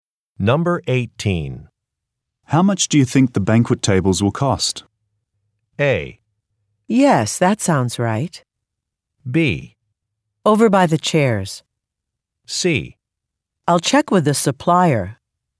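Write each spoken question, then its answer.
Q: How much do you think the banquet tables will cost?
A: C: I'll check with the supplier.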